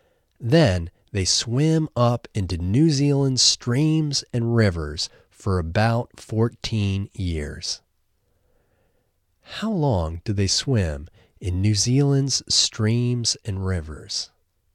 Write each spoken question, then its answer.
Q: How long do they swim in New Zealand's streams and rivers?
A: They swim in New Zealand's streams and rivers for about 14 years.